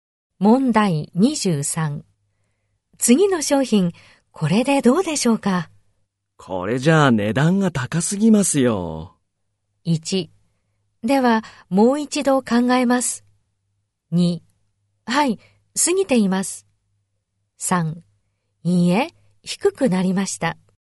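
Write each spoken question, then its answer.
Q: 次の商品、これでどうでしょうか?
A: 2: ではもう一度考えます。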